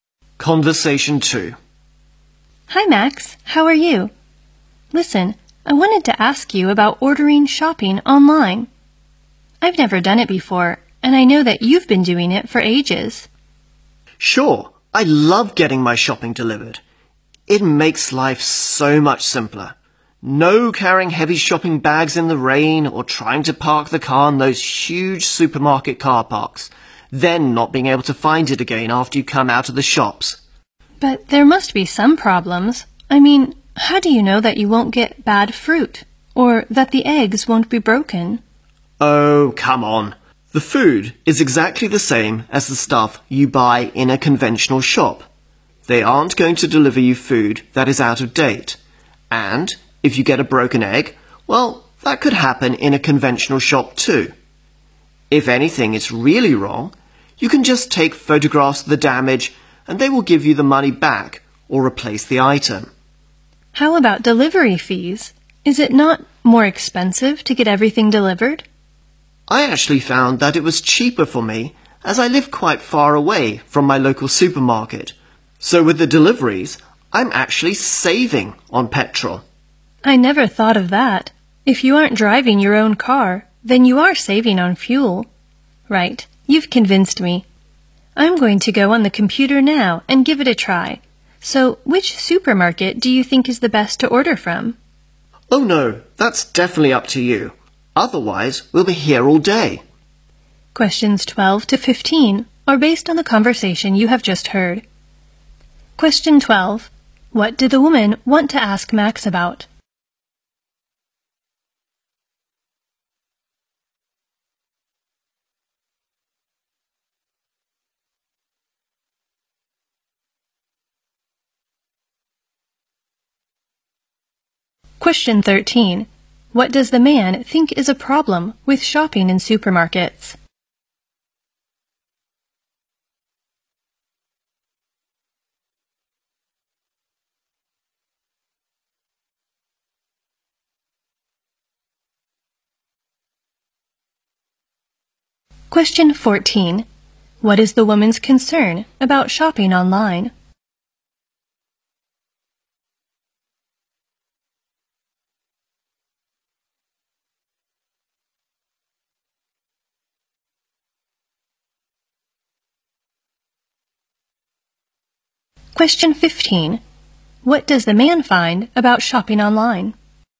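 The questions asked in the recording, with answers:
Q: What did the woman want to ask Max about?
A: Ordering shopping online

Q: What does the man think is a problem with shopping in supermarkets?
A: Carrying heavy bags and parking or finding the car in huge car parks

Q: What is the woman's concern about shopping online?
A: Getting bad fruit or broken eggs

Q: What does the man find about shopping online?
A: It is cheaper for him because he saves on petrol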